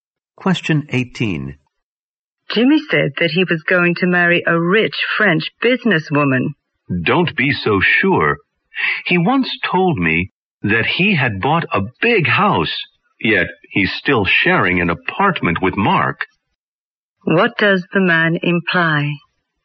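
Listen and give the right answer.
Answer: What Jimmy says is not reliable.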